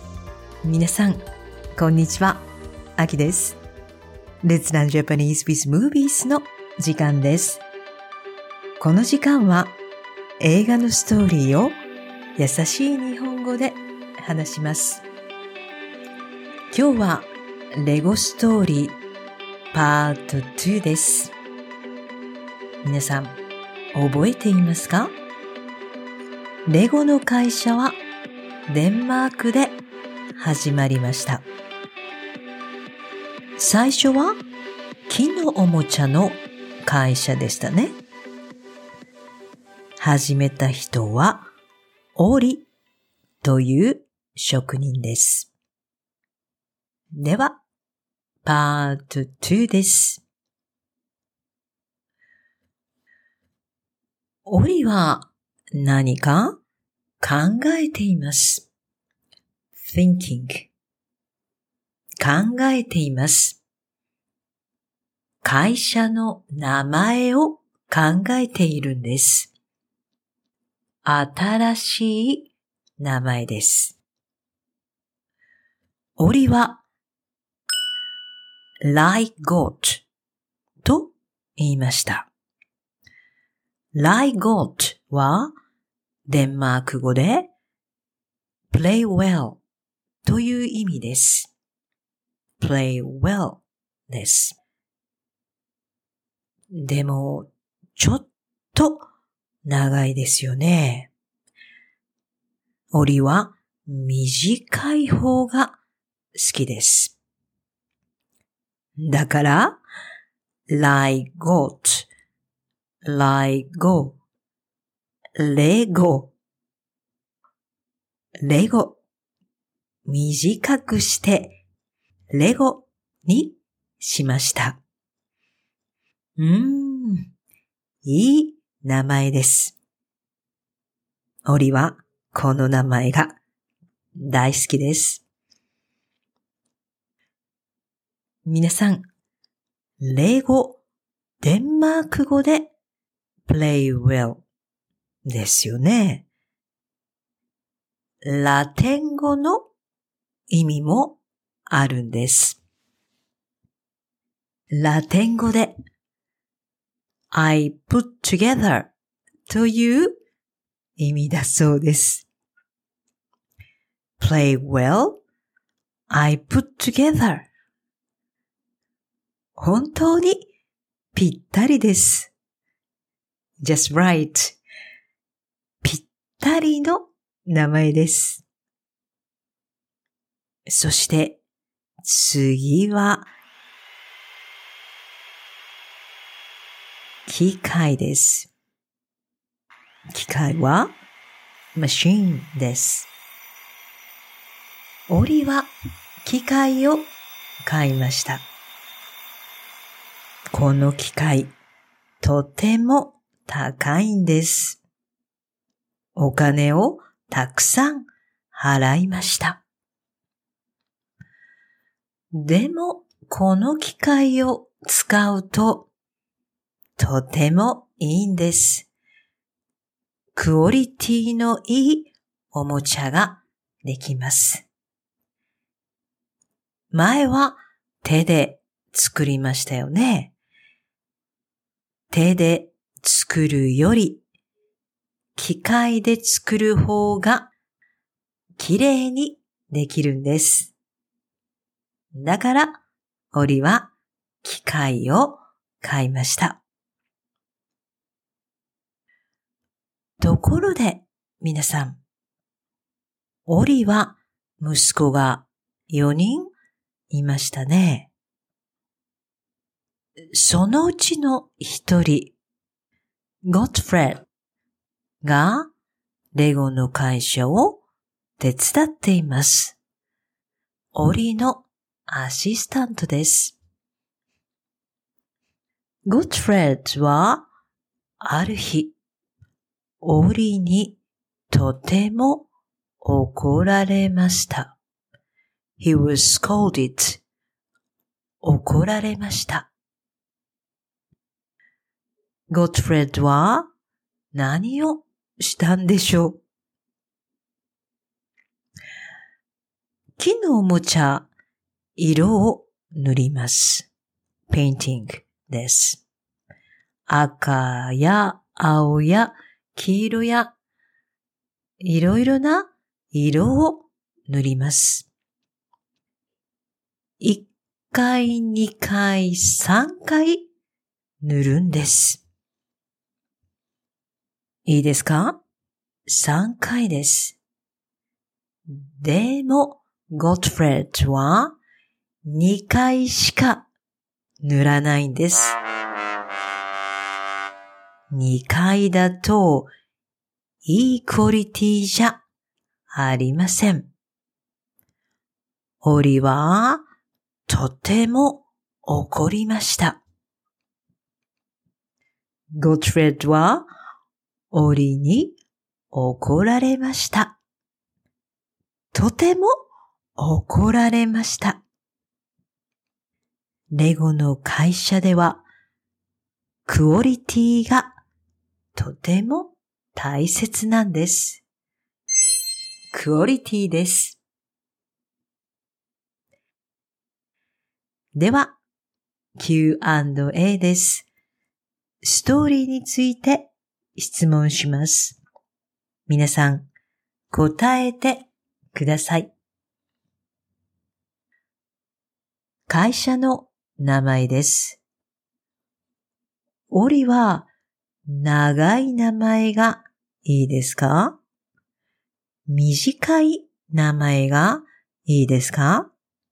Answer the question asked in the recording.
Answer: 短い名前がいいです。